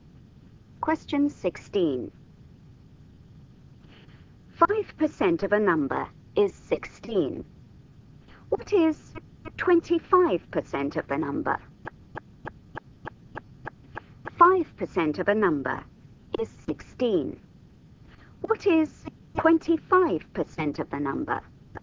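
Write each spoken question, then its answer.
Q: 5% of a number is 16. What is 25% of the number?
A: 80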